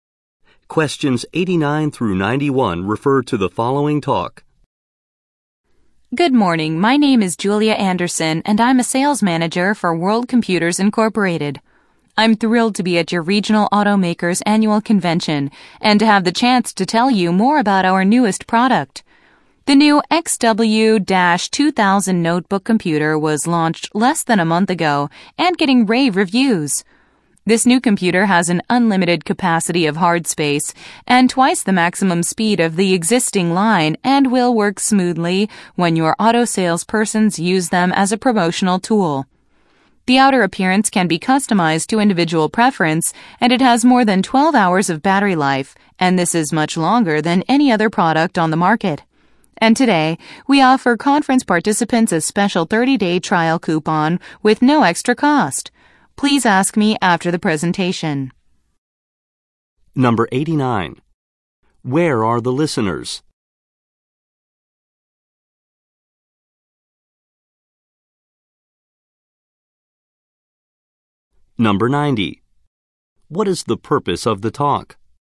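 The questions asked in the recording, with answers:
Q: Where are the listeners?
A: At an automakers' convention

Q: What is the purpose of the talk?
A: To introduce a new notebook computer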